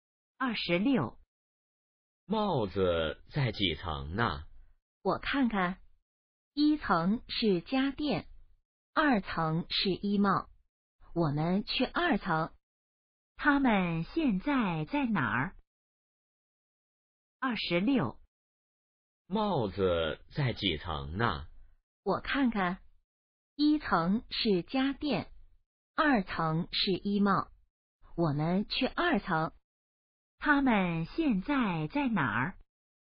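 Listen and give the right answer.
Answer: 商场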